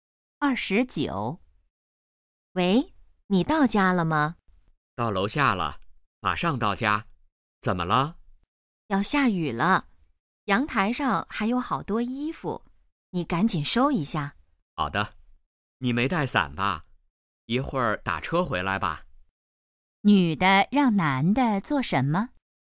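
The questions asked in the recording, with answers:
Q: 女的让男的做什么?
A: 收阳台上的衣服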